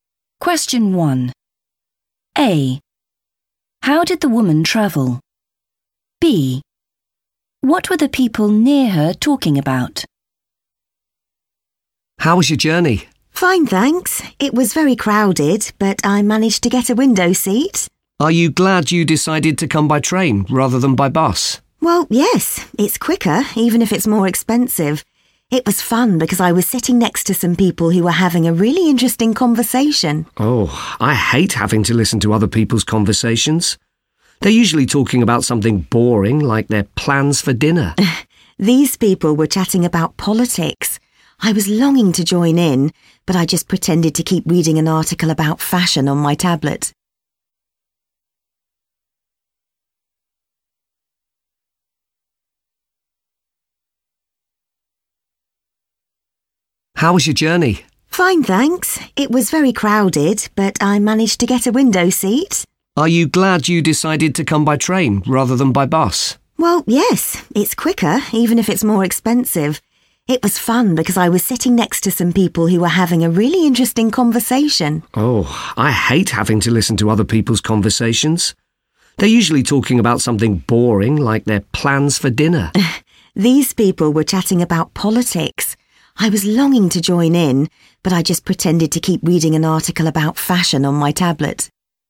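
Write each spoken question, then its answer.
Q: How did the woman travel?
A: by train

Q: What were the people near her talking about?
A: politics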